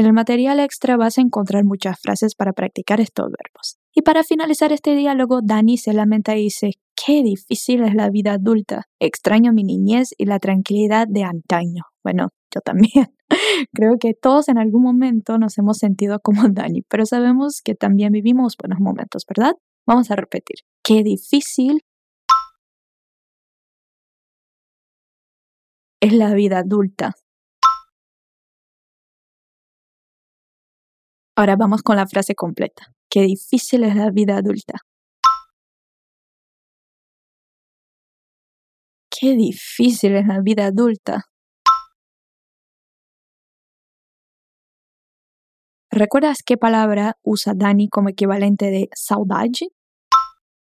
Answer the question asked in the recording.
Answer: Extraño.